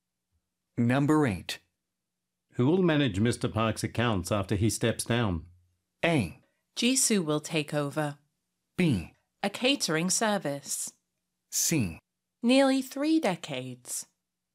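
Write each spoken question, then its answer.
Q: Who will manage Mr. Park's accounts after he steps down?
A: A: Jisoo will take over.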